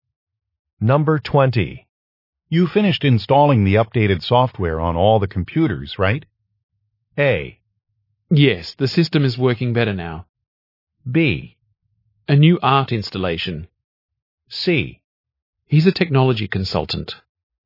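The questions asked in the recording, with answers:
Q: You finished installing the updated software on all the computers, right?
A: A: Yes, the system is working better now.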